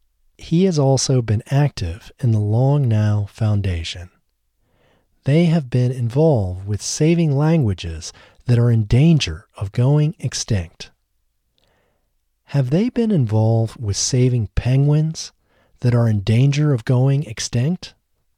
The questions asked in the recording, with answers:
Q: Have they been involved with saving penguins that are in danger of going extinct?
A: No, they haven't been involved with saving penguins that are in danger of going extinct.